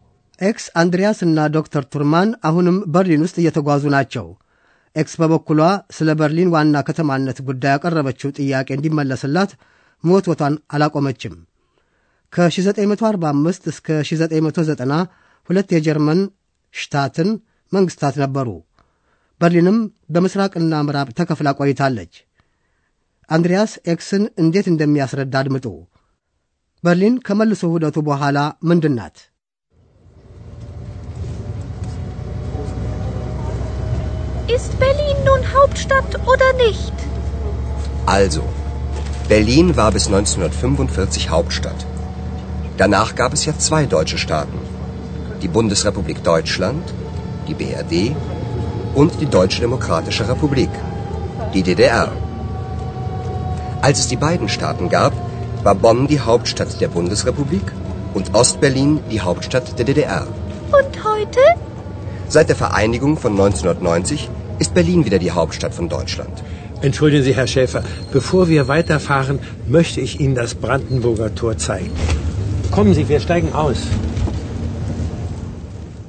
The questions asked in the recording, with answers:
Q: በርሊን ከመልሶ ውህደቱ በኋላ ምንድን ናት?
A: ሁለቱ የጀርመን ግዛቶች በ1990 መልሰው ከተዋህዱ ወዲህ በርሊን እንደገና የጀርመን ዋና ከተማ ናት።